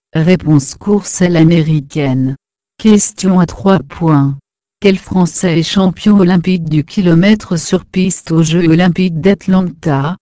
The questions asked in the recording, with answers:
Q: Quel Français est champion olympique du kilomètre sur piste aux Jeux olympiques d'Atlanta?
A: Réponse. Florian Rousseau.